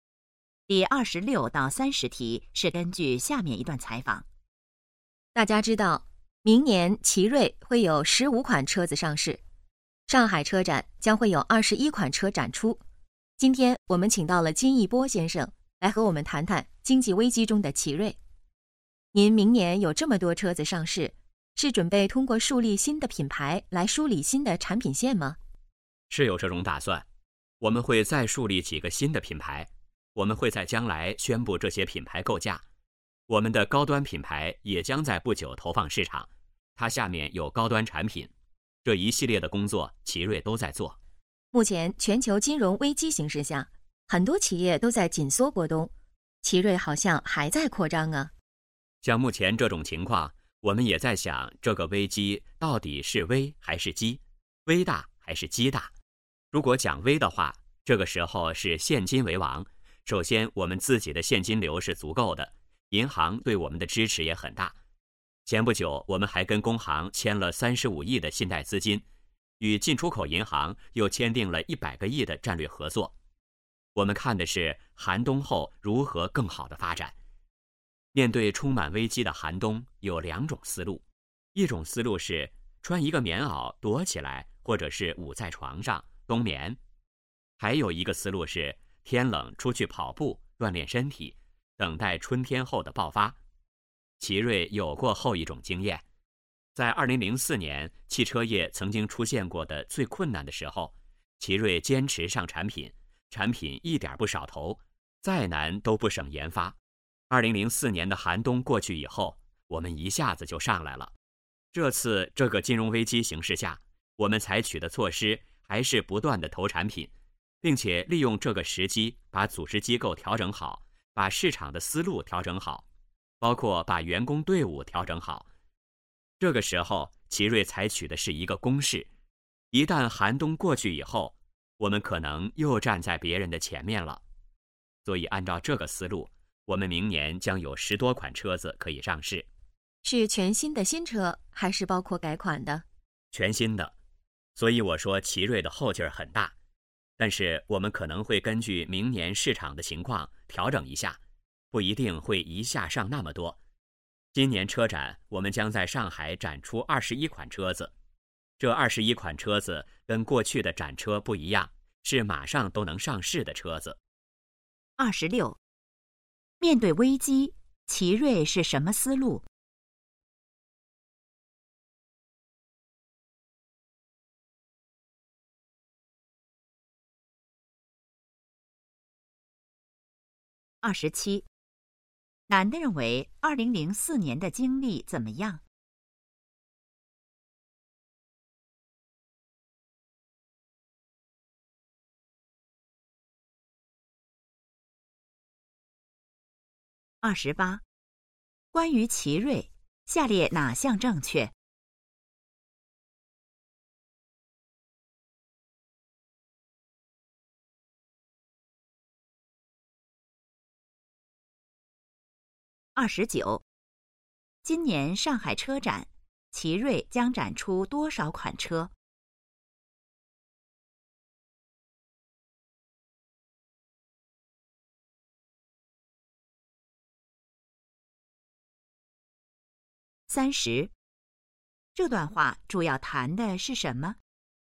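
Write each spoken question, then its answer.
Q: 面对危机,奇瑞是什么思路?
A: 采取攻势,不断投产品,像天冷出去跑步锻炼一样

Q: 今年上海车展,奇瑞将展出多少款车?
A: 21款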